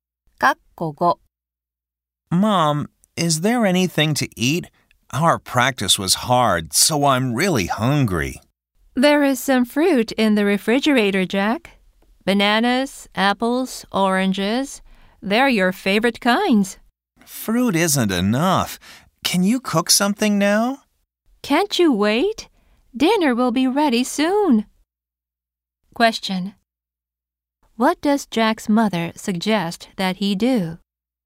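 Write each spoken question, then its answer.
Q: What does Jack's mother suggest that he do?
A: Wait for dinner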